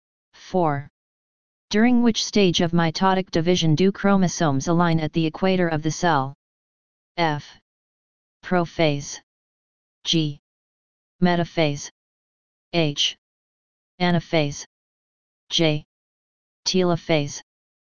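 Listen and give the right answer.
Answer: G: Metaphase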